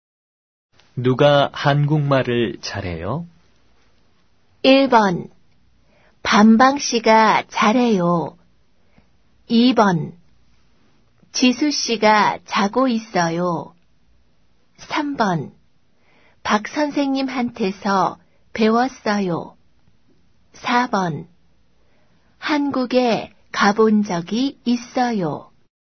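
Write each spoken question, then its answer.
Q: 누가 한국말을 잘해요?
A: 1: 반방 씨가 잘해요.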